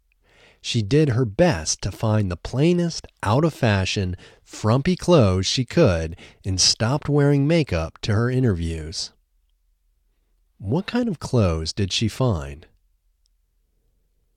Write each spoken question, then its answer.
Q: What kind of clothes did she find?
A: She found the plainest, out-of-fashion, frumpy clothes.